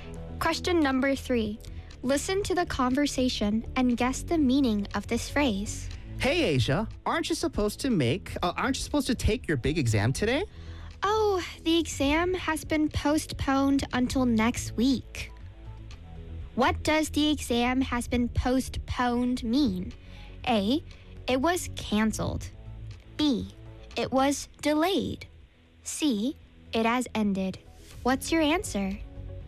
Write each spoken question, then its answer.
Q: What does the exam has been postponed mean?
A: It was delayed.